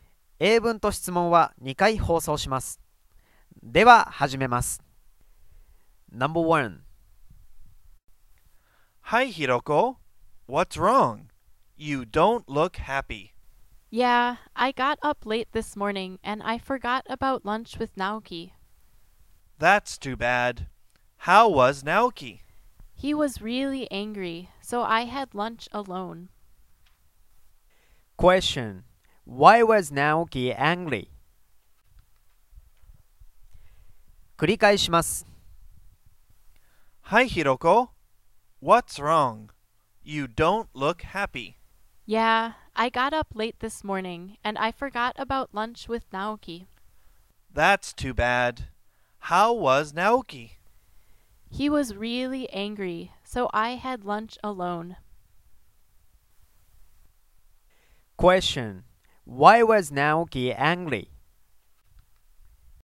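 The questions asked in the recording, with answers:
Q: Why was Naoki angry?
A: Because Hiroko forgot about lunch with him.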